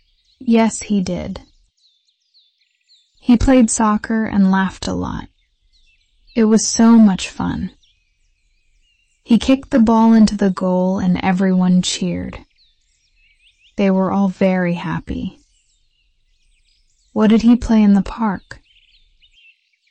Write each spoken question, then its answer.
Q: What did he play in the park?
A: Soccer. He played soccer.